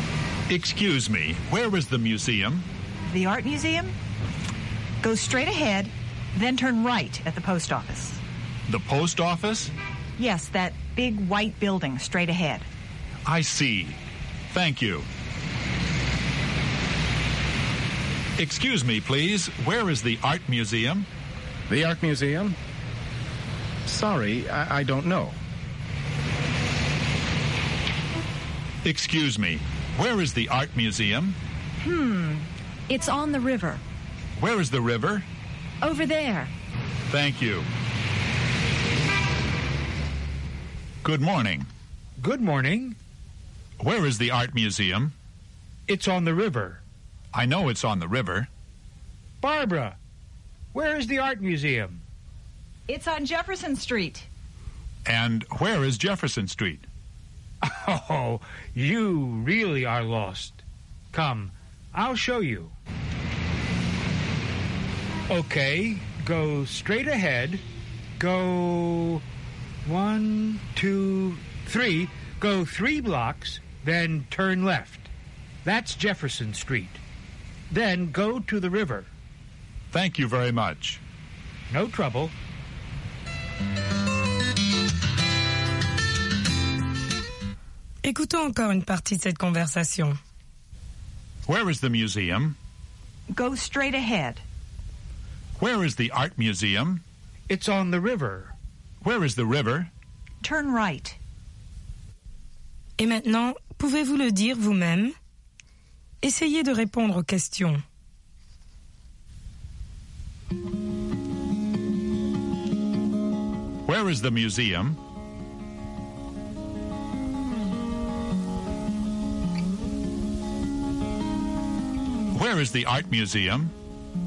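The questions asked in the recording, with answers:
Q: Where is the museum?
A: Go straight ahead, then turn right at the post office.

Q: Where is the art museum?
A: It's on the river.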